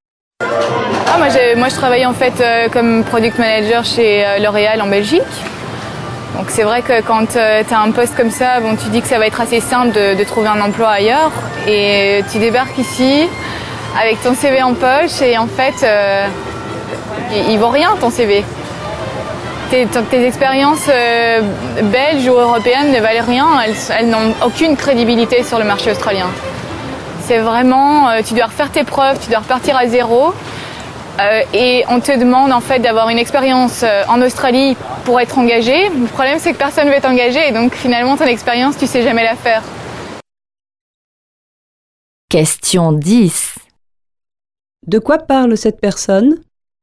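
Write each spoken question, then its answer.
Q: De quoi parle cette personne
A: De la difficulté à trouver un emploi en Australie, son expérience européenne n'y étant pas reconnue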